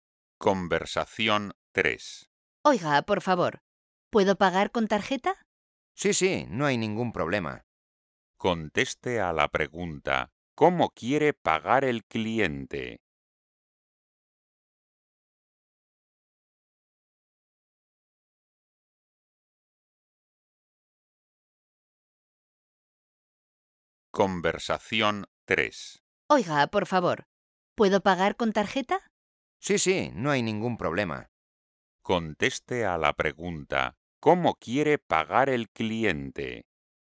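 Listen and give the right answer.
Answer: con tarjeta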